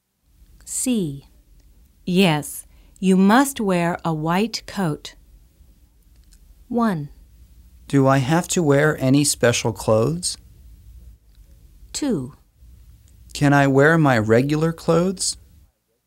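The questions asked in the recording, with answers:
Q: Yes, you must wear a white coat.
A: 1: Do I have to wear any special clothes?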